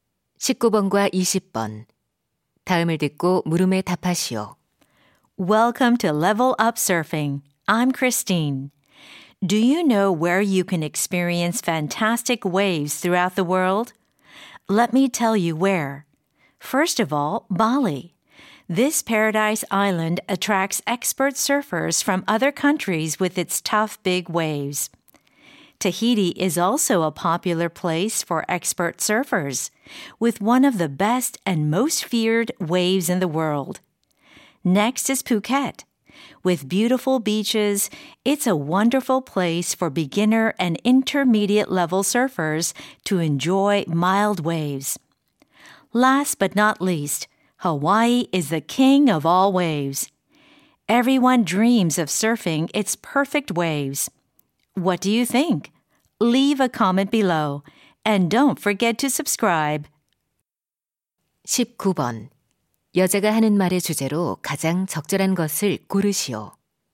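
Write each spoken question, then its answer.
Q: 여자가 하는 말의 주제로 가장 적절한 것을 고르시오.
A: 세계의 서핑하기 좋은 장소들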